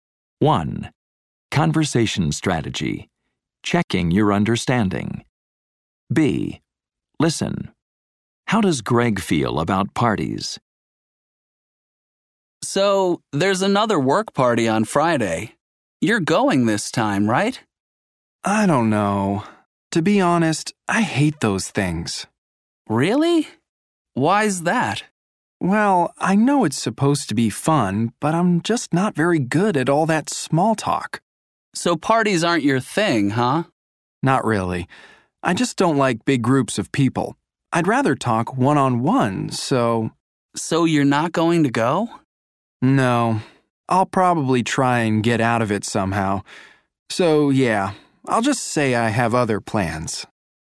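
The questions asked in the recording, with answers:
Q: How does Greg feel about parties?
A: He hates them; he's not good at small talk and doesn't like big groups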